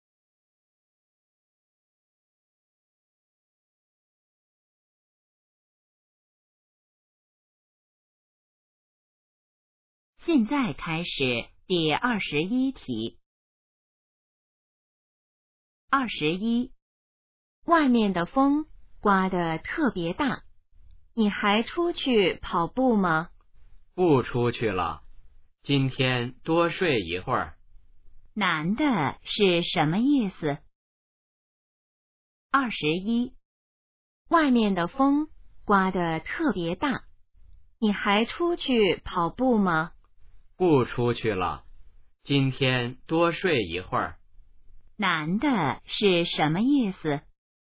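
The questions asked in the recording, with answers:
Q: 男的是什么意思?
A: 今天不出去跑步了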